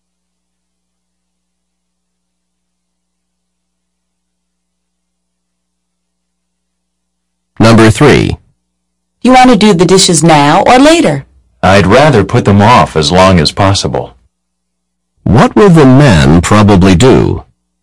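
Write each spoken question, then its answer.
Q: What will the man probably do?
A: Do the dishes later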